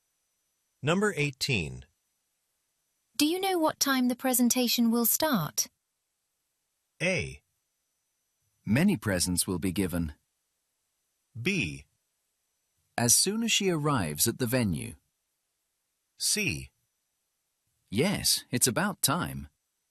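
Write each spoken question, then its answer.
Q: Do you know what time the presentation will start?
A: B: As soon as she arrives at the venue.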